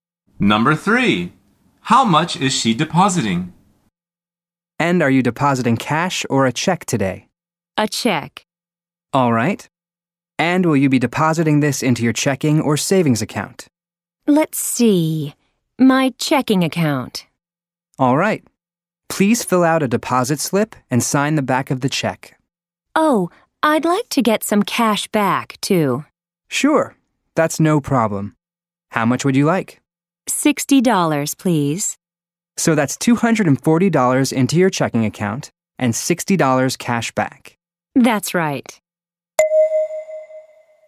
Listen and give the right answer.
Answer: The answer is $240.